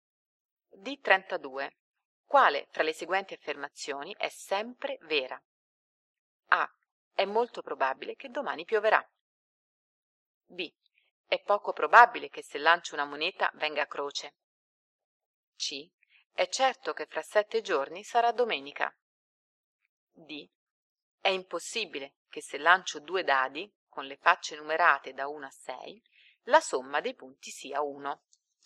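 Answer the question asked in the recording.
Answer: D: È impossibile che se lancio 2 dadi, con le facce numerate da 1 a 6, la somma dei punti sia 1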